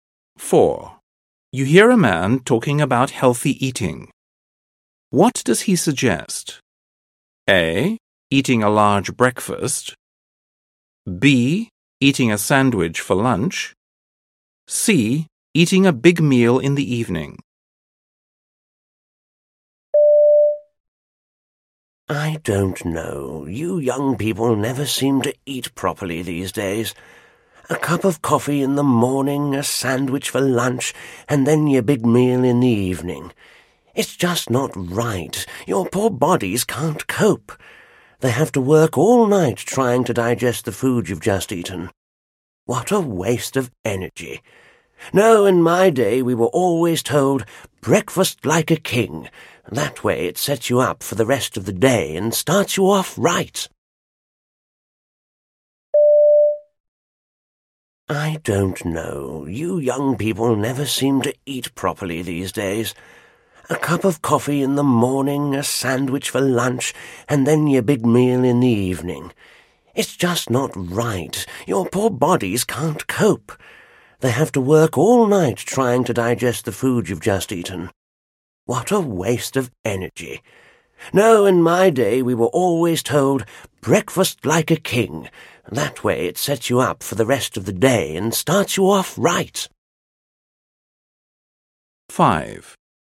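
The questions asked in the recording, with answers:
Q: What does he suggest?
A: A: Eating a large breakfast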